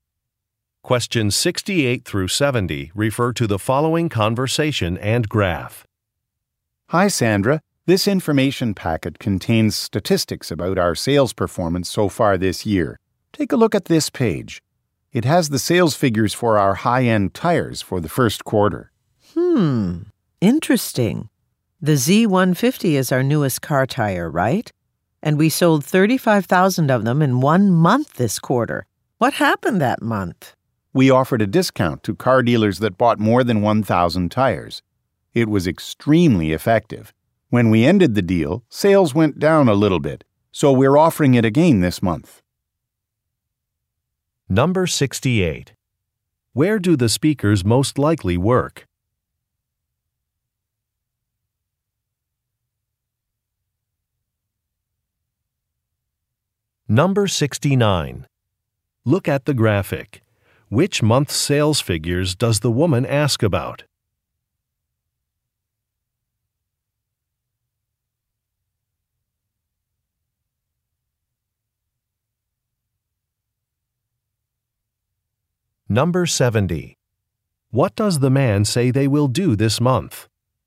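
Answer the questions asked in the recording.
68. At a tire company
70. Offer the discount to car dealers again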